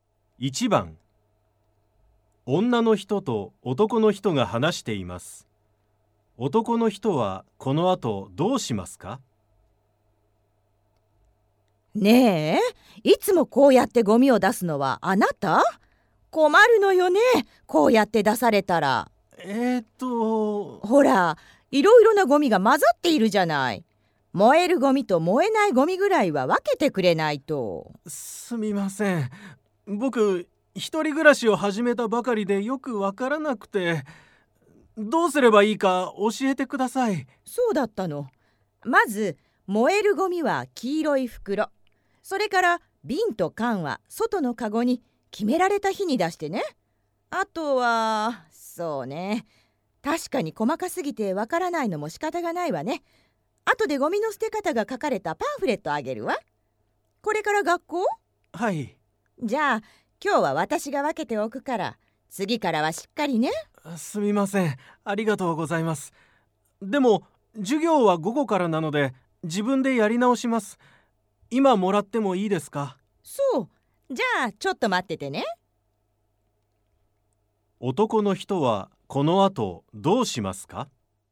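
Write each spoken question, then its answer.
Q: 男の人はこの後どうしますか?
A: パンフレットをもらって、自分でゴミを分け直す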